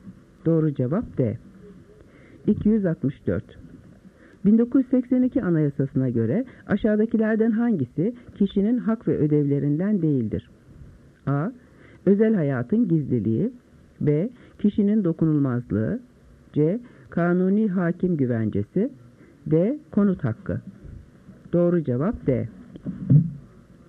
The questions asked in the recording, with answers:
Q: 1982 Anayasası'na göre aşağıdakilerden hangisi kişinin hak ve ödevlerinden değildir?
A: Doğru cevap D.